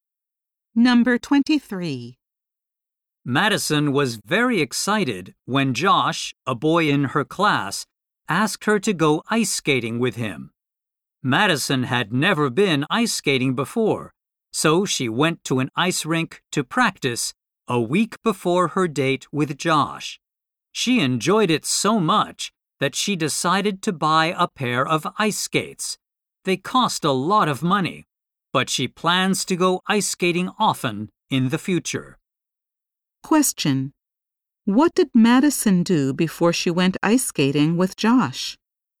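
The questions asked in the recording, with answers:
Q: What did Madison do before she went ice skating with Josh?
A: She practiced at an ice rink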